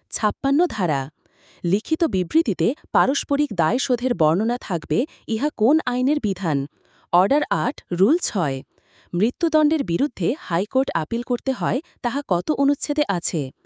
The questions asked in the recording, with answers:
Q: মৃত্যুদণ্ডের বিরুদ্ধে high court appeal করতে হয় তাহা কত অনুচ্ছেদে আছে?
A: ১৫০ অনুচ্ছেদে।